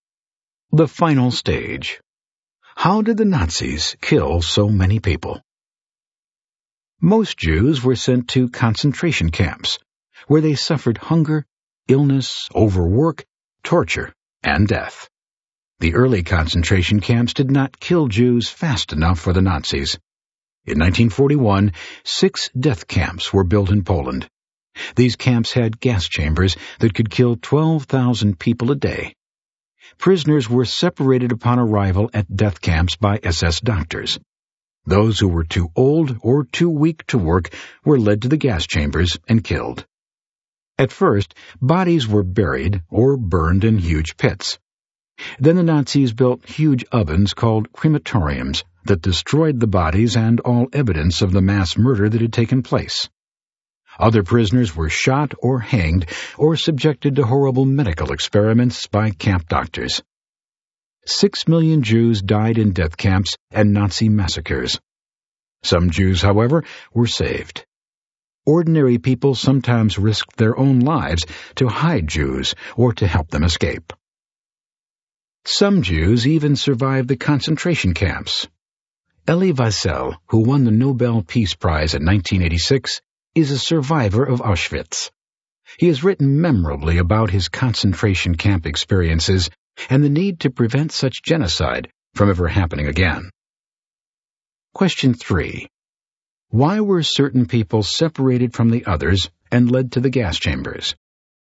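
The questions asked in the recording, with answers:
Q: Why were certain people separated from the others and led to the gas chambers?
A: They were too old or too weak to work.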